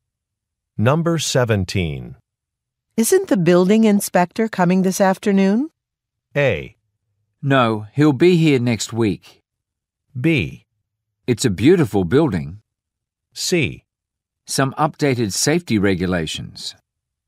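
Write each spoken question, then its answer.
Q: Isn't the building inspector coming this afternoon?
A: A: No, he'll be here next week.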